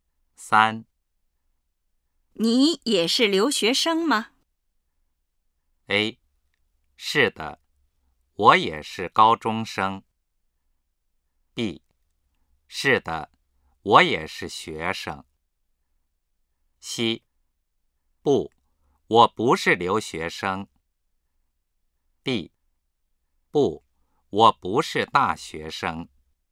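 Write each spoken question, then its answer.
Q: 你也是留学生吗?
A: C: 不,我不是留学生。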